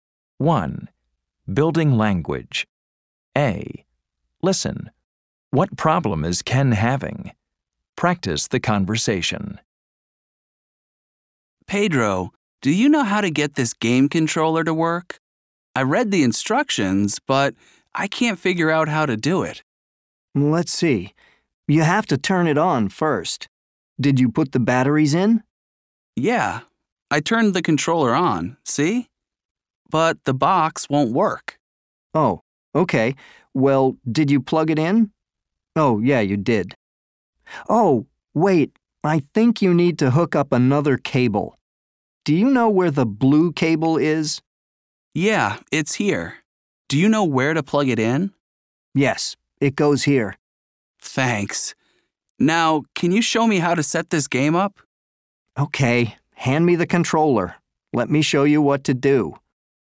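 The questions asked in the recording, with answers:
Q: What problem is Ken having?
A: He can't get his game controller/game box to work.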